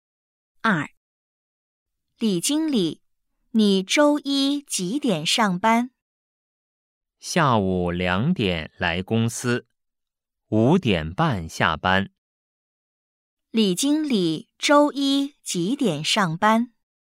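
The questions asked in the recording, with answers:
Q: 李经理周一几点上班?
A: 下午两点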